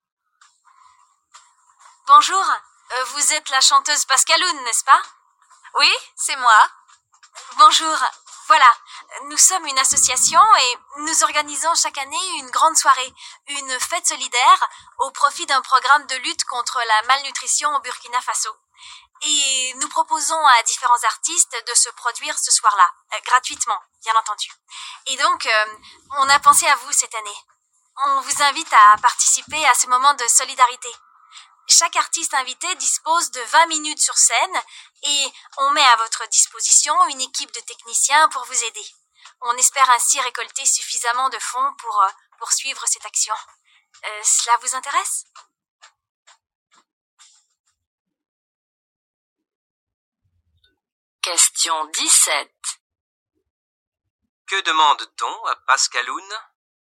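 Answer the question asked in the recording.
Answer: De chanter gratuitement lors d'une soirée solidaire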